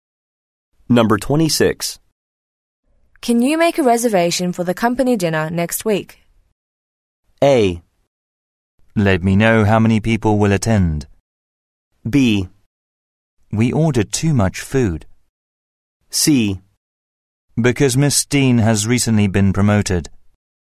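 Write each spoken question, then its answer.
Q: Can you make a reservation for the company dinner next week?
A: A: Let me know how many people will attend.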